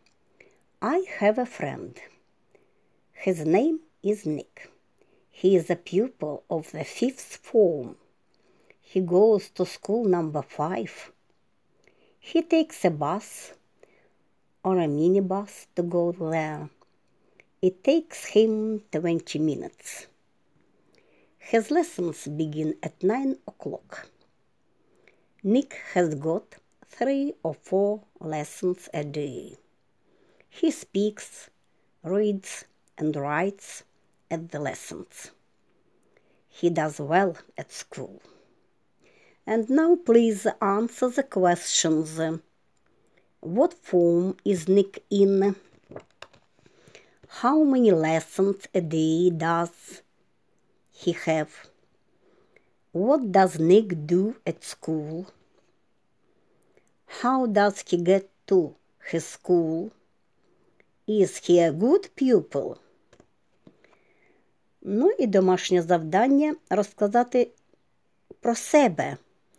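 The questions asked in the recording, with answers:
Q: What form is Nick in?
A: The fifth form

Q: How many lessons a day does he have?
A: 3 or 4 lessons

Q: What does Nick do at school?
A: He speaks, reads, and writes

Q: How does he get to his school?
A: By bus or minibus

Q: Is he a good pupil?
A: Yes, he does well at school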